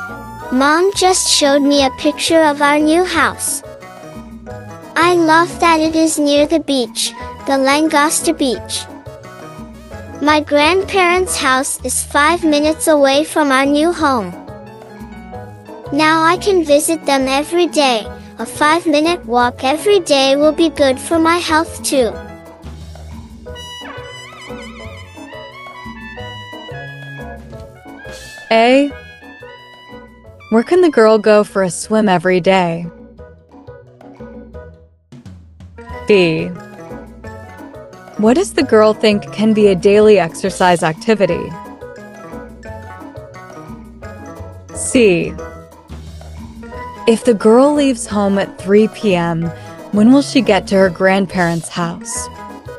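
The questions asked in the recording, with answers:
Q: Where can the girl go for a swim every day?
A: Langosta Beach

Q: What does the girl think can be a daily exercise activity?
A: The 5-minute walk to her grandparents' house

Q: If the girl leaves home at 3 p.m., when will she get to her grandparents' house?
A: At 3:05 p.m.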